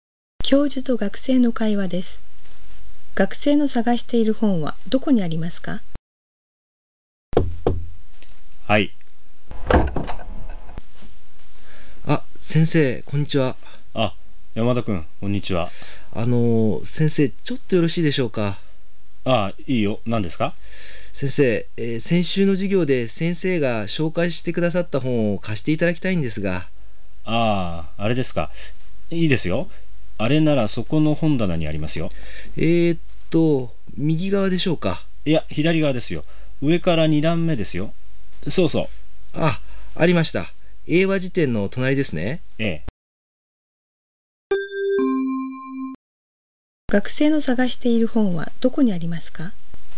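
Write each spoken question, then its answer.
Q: 学生の探している本はどこにありますか?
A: 左側の本棚の上から2段目、英和辞典の隣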